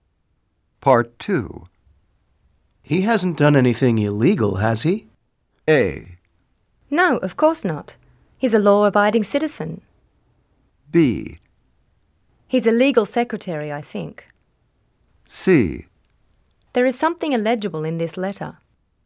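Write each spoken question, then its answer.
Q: He hasn't done anything illegal, has he?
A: A: No, of course not. He's a law-abiding citizen.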